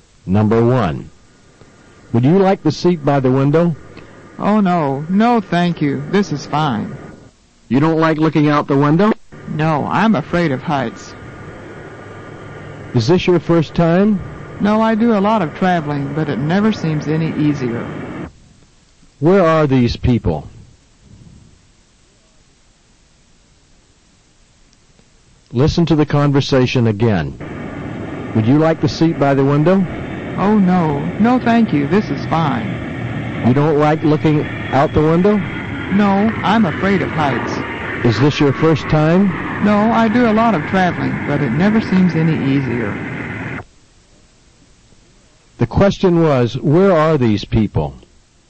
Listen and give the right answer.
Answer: Repeat, they are on a plane.